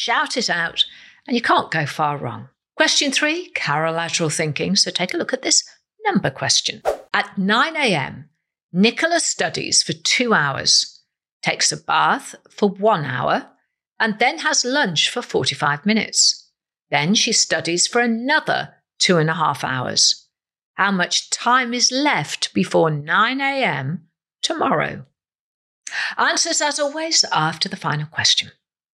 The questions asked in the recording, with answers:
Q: How much time is left before 9 a.m.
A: you're left with 17 hours and 45 minutes.